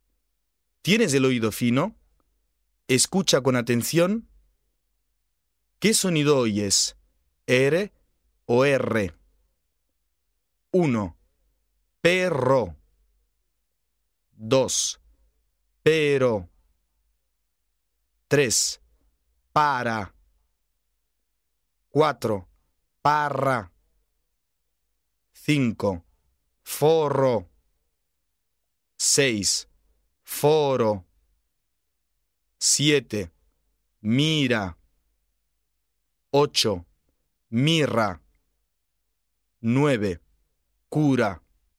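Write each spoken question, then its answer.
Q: Perro.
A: rr

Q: Parra.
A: rr

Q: Forro.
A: rr

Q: Mirra.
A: rr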